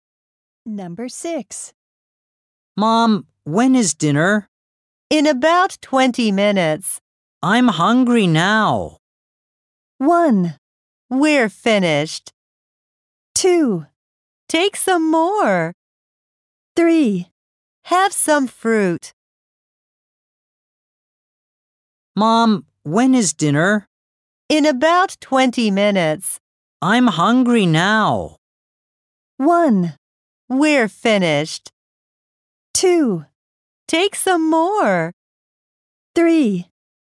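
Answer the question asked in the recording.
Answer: 3: Have some fruit.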